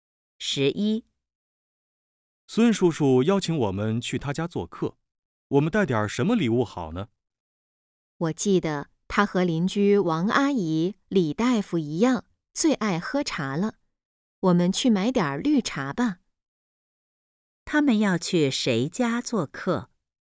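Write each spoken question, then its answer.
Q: 他们要去谁家做客?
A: 孙叔叔家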